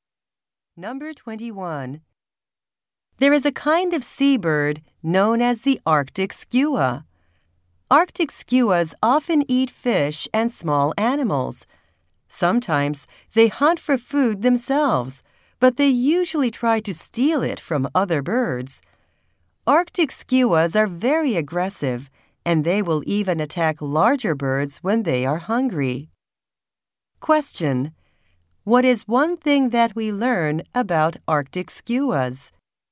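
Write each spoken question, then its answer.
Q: What is one thing that we learn about Arctic skuas?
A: They usually steal food from other birds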